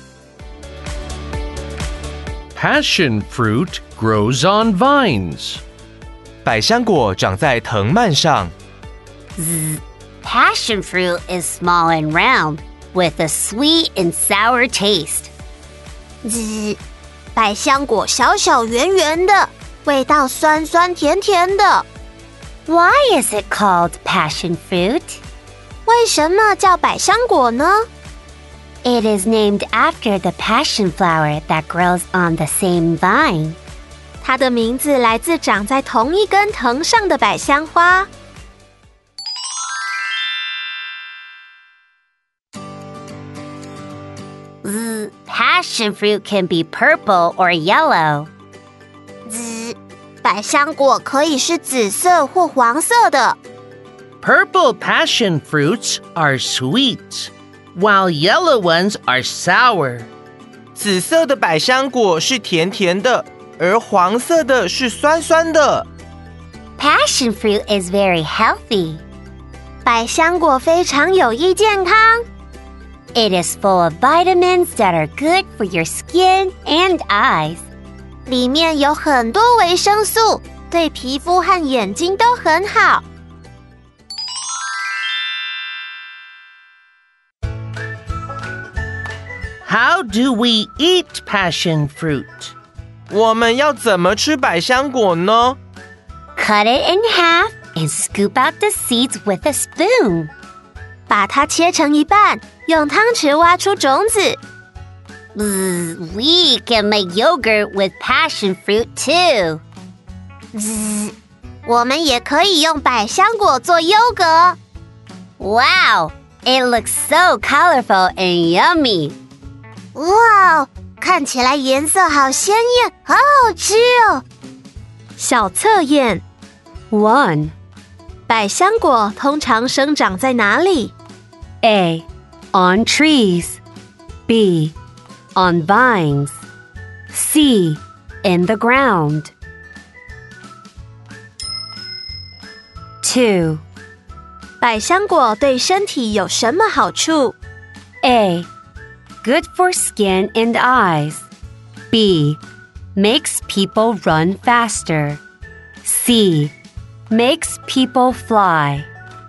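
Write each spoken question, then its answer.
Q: 百香果通常生长在哪里?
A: B: on vines

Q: 百香果对身体有什么好处?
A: A: good for skin and eyes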